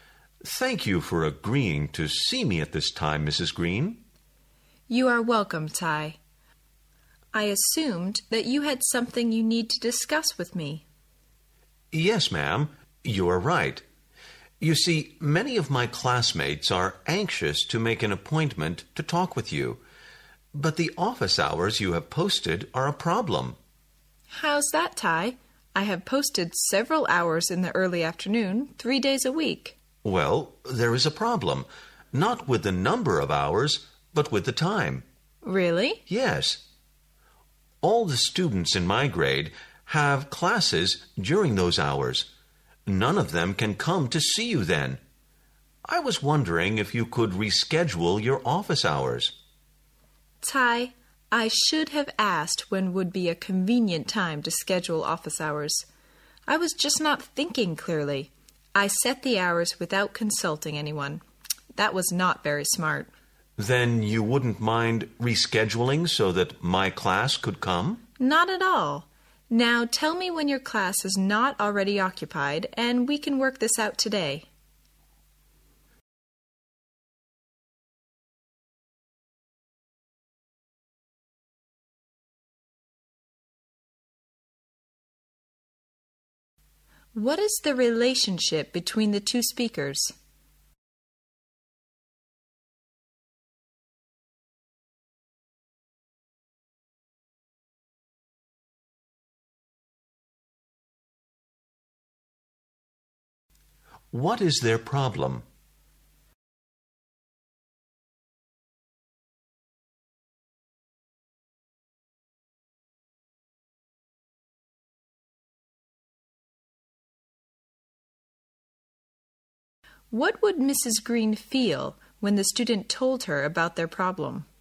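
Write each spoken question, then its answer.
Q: What is the relationship between the two speakers?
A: Student and teacher

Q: What is their problem?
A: Mrs. Green's office hours are at a time when all the students in Ty's grade have classes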